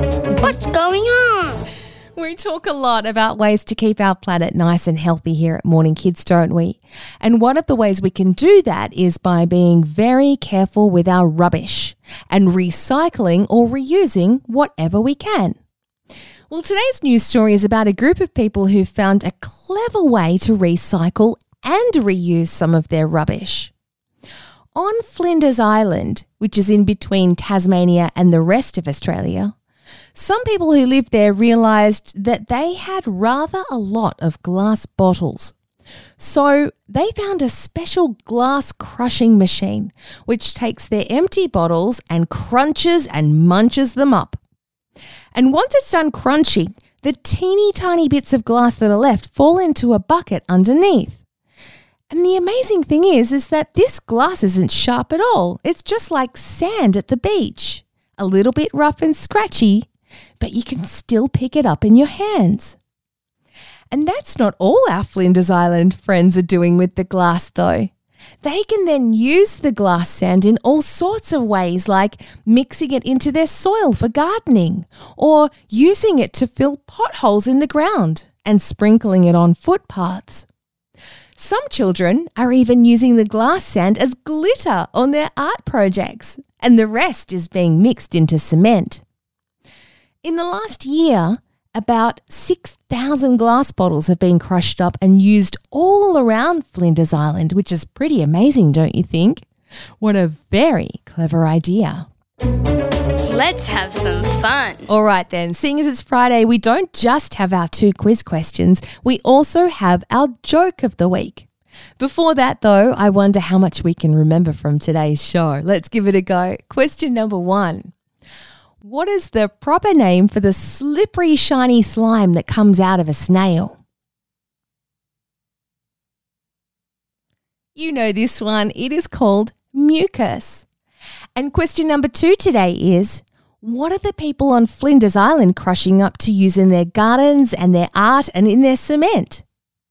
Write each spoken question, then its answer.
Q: what are the people on Flinders Island crushing up to use in their gardens and their art and in their cement?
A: Yes, they're using glass bottles.